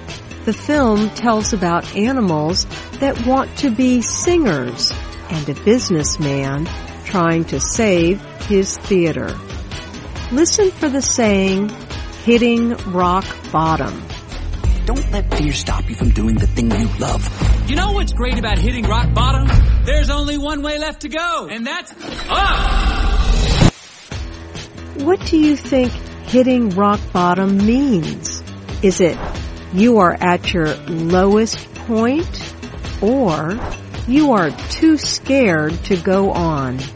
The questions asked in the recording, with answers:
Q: What do you think hitting rock bottom means?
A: Hitting rock bottom means you are at your lowest point.